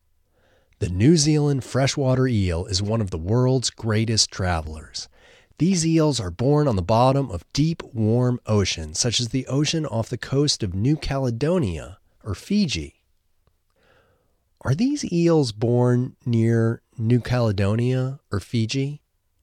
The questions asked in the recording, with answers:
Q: Are these eels born near New Caledonia or Fiji?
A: Yes, these eels are born near New Caledonia or Fiji.